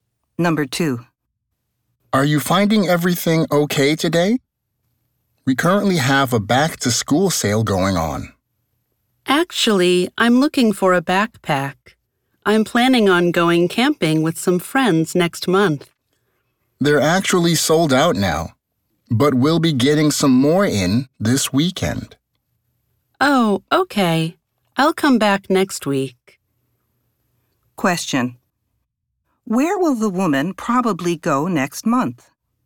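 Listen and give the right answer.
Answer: Camping with some friends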